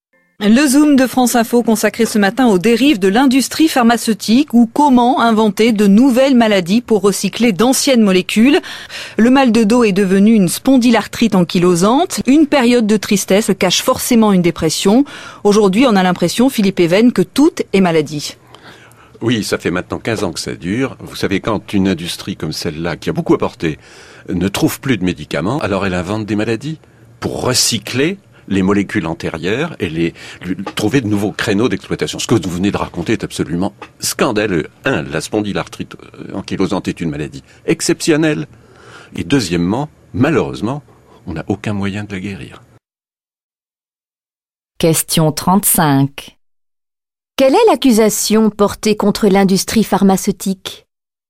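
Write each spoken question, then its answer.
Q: Quelle est l'accusation portée contre l'industrie pharmaceutique ?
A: Elle invente de nouvelles maladies pour recycler d'anciennes molécules.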